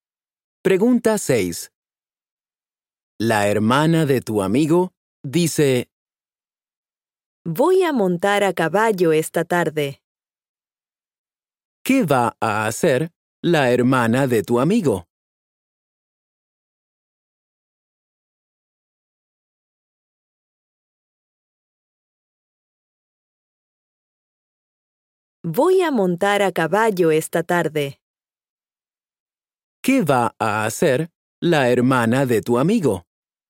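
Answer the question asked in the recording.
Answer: Montar a caballo esta tarde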